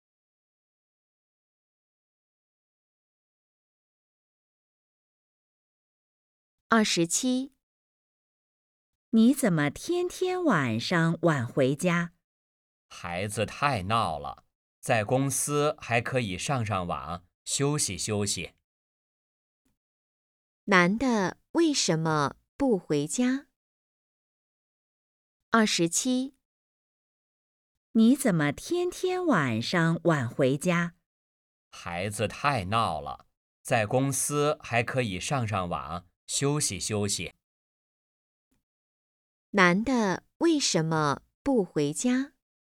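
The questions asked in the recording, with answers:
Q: 男的为什么不回家?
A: 孩子太闹了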